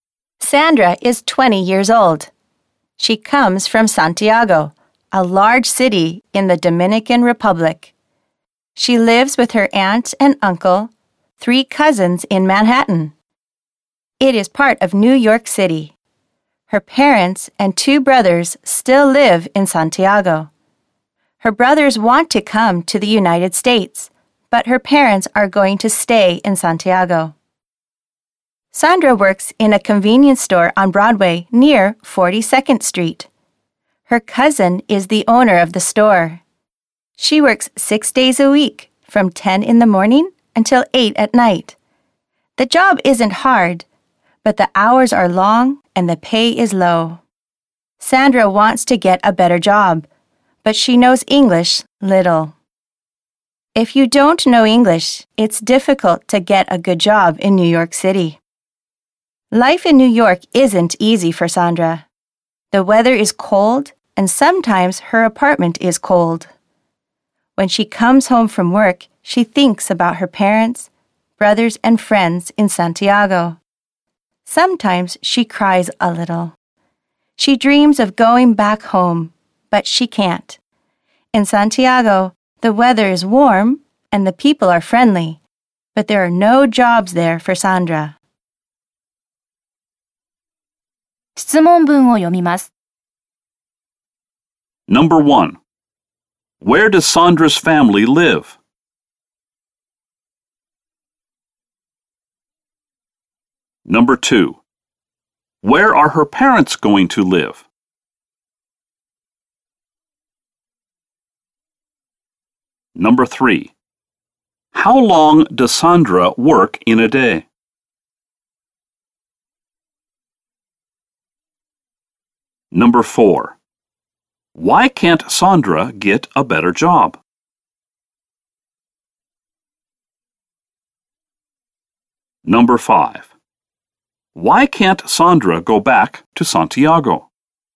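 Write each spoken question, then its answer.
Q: Where are her parents going to live?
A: In Santiago

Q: How long does Sandra work in a day?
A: 10 hours

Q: Why can't Sandra get a better job?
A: Because she knows little English

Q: Why can't Sandra go back to Santiago?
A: Because there are no jobs there for her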